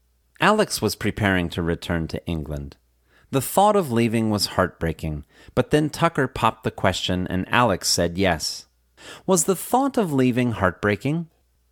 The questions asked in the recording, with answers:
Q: Was the thought of leaving heartbreaking?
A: Yes, the thought of leaving was heartbreaking.